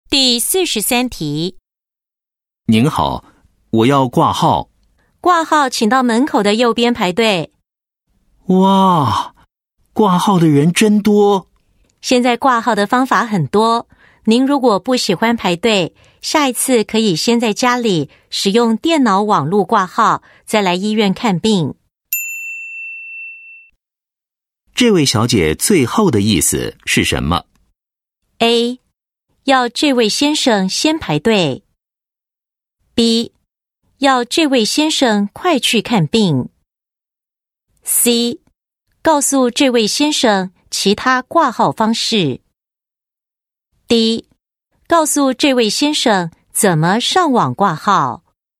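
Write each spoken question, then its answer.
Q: 这位小姐最后的意思是什么?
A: C: 告诉这位先生其他挂号方式。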